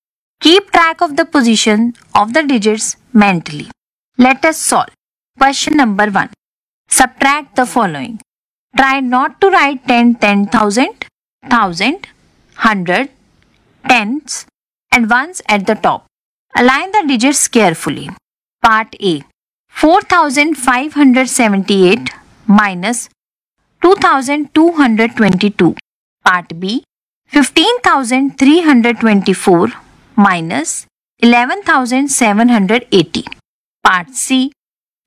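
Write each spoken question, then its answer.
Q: 4,578 minus 2,222.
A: 2,356

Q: 15,324 minus 11,780.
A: 3,544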